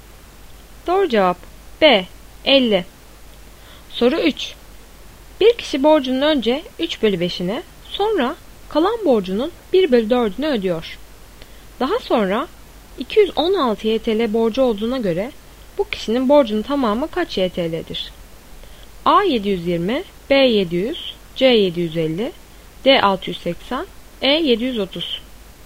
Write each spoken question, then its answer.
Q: Daha sonra 216 YTL borcu olduğuna göre bu kişinin borcunun tamamı kaç YTL'dir?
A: Doğru cevap A. 720.